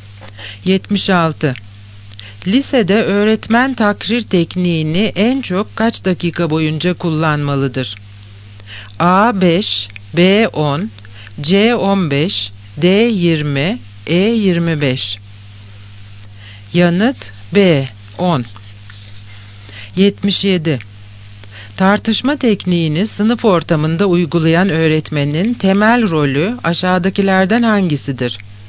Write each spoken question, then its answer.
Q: Lisede öğretmen takrir tekniğini en çok kaç dakika boyunca kullanmalıdır?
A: Yanıt B. 10.